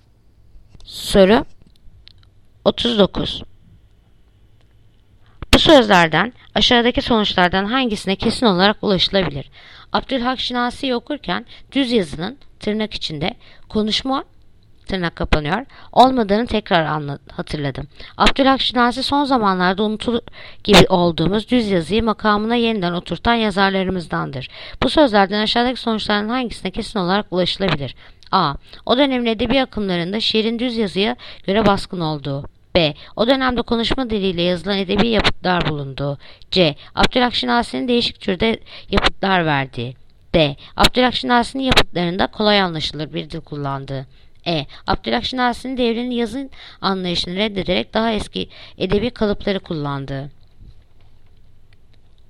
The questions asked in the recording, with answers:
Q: Bu sözlerden aşağıdaki sonuçlardan hangisine kesin olarak ulaşılabilir?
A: Yanıt: Bursa. O dönemde konuşma diliyle yazılan edebi yapıtlar bulundu.